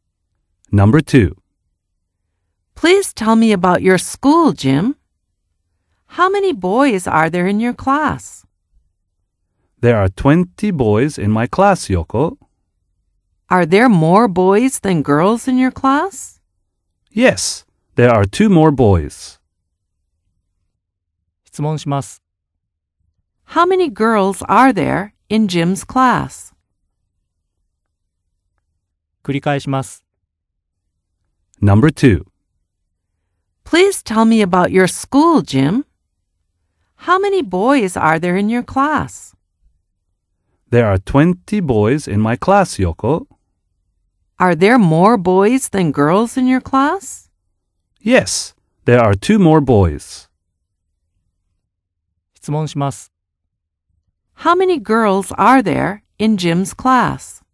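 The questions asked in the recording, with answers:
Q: How many girls are there in Jim's class?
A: 18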